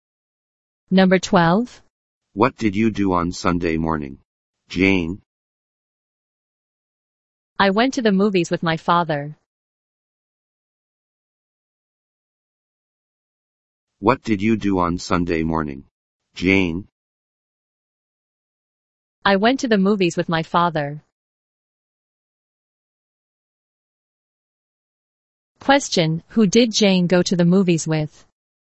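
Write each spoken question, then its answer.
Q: Question, who did Jane go to the movies with?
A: Her father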